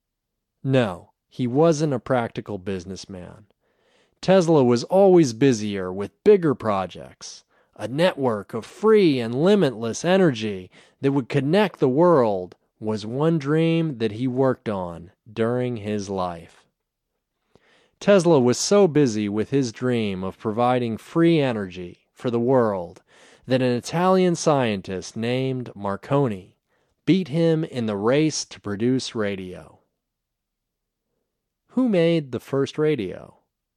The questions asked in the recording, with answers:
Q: Who made the first radio?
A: Marconi made the first radio.